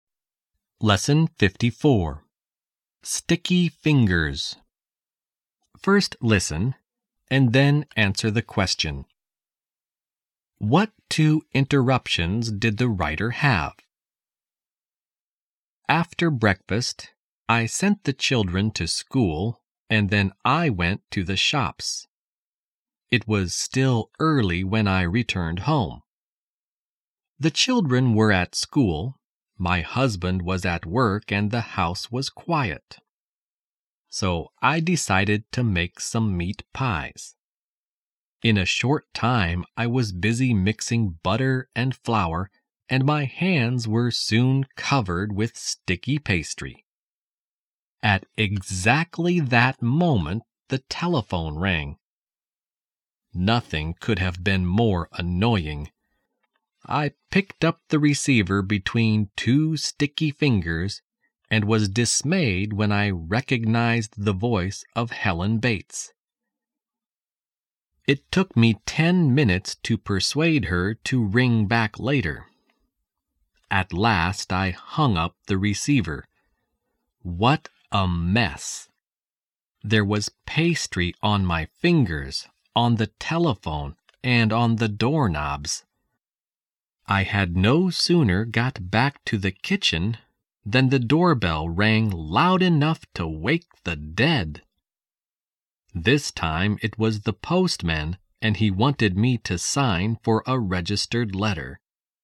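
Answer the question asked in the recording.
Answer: A telephone call from Helen Bates and the postman ringing the doorbell with a registered letter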